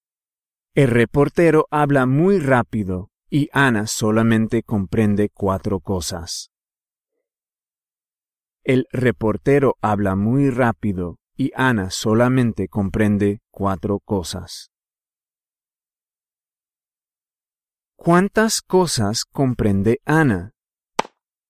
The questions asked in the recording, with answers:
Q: ¿Cuántas cosas comprende Ana?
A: Cuatro cosas.